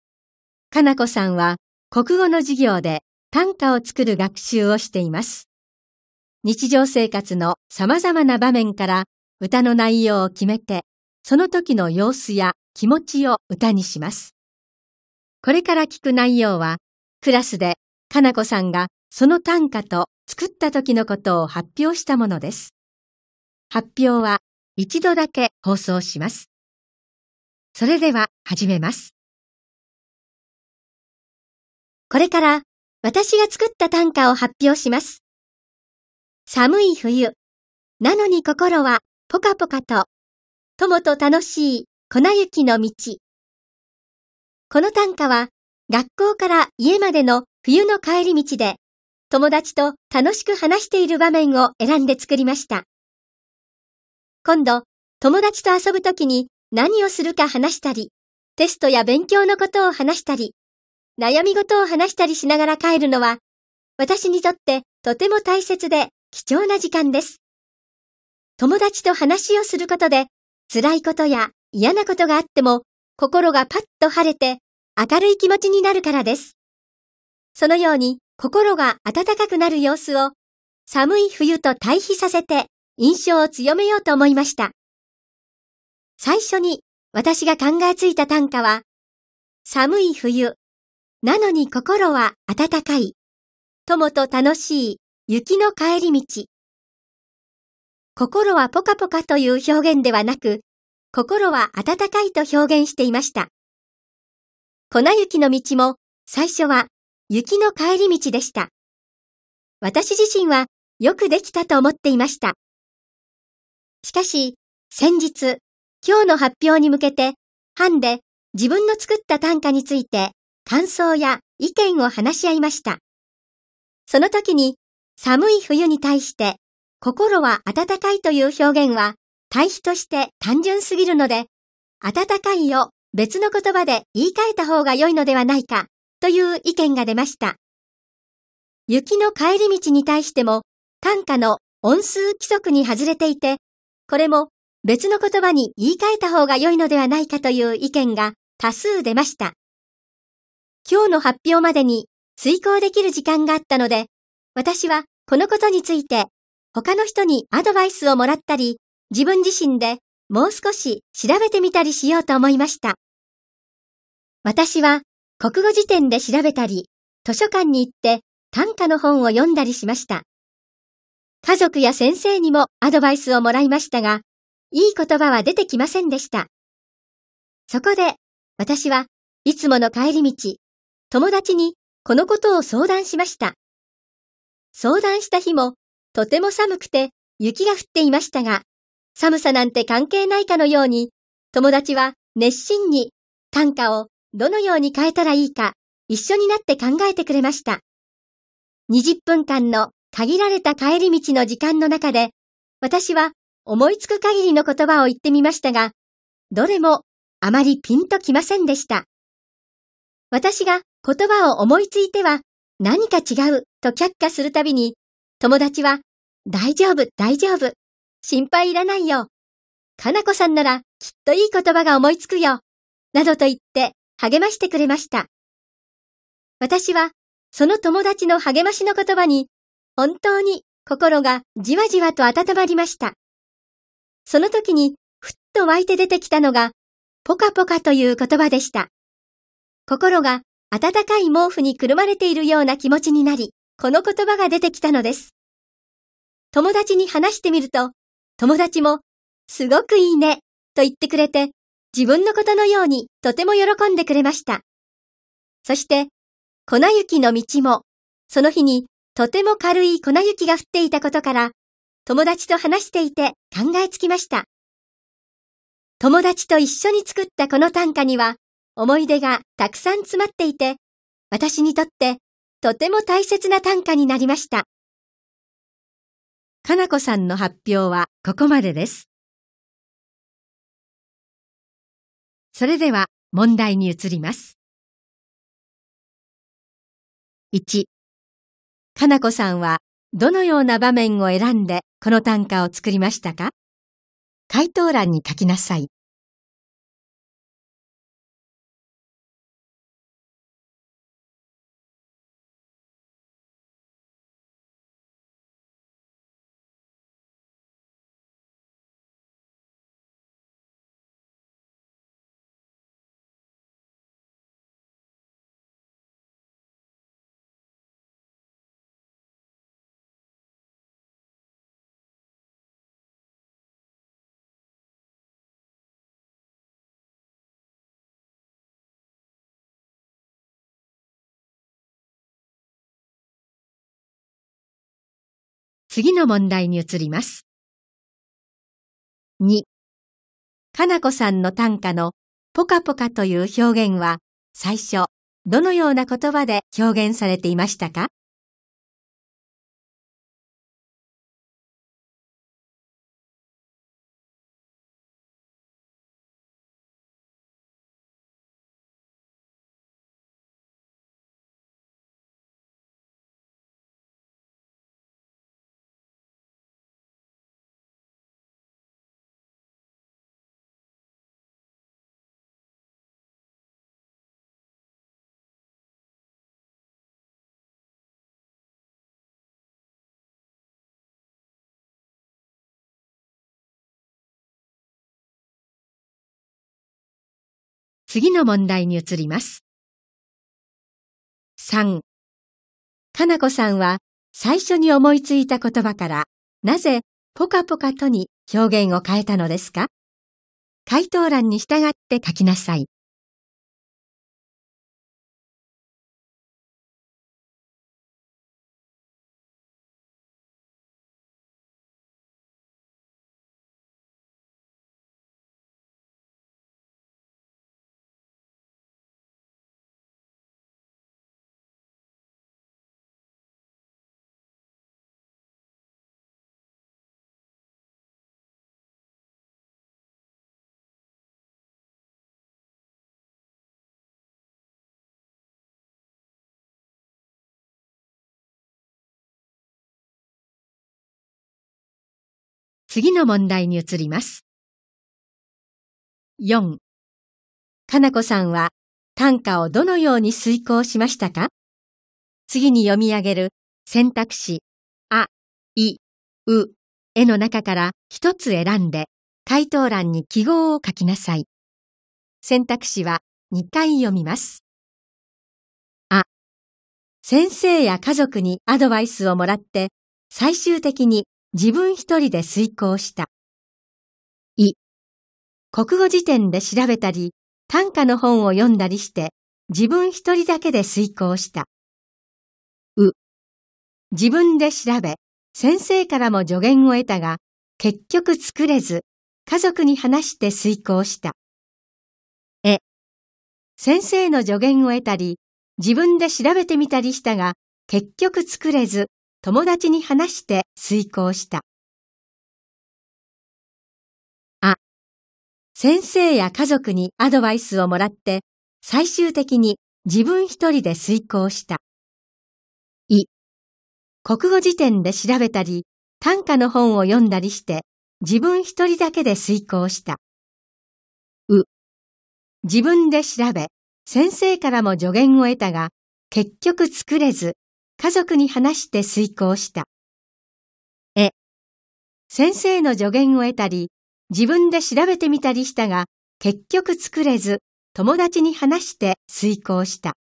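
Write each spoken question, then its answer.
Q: かなこさんは どのような場面を選んでこの短歌を作りましたか?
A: 学校から家までの冬の帰り道で、友達と楽しく話している場面

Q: かなこさんの短歌のポカポカという表現は最初どのような言葉で表現されていましたか?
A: 心は温かい

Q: かなこさんは最初に思いついた言葉からなぜポカポカとに表現を変えたのですか?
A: 温かいという表現は寒い冬との対比として単純すぎると班で意見が出たため。友達の励ましで心が温まったときにポカポカという言葉が浮かんだ

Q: かなこさんは短歌をどのように遂行しましたか?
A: え: 先生の助言を得たり、自分で調べてみたりしたが、結局作れず、友達に話して遂行した。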